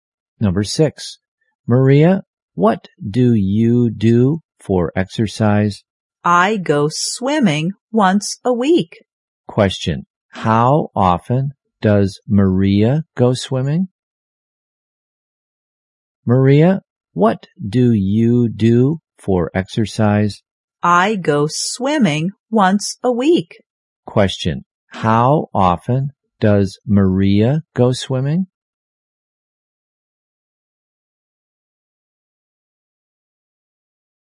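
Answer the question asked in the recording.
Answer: Once a week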